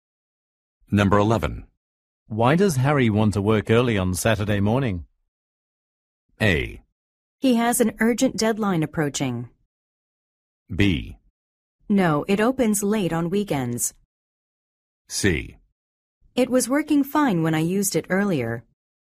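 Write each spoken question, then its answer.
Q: Why does Harry want to work early on Saturday morning?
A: A: He has an urgent deadline approaching.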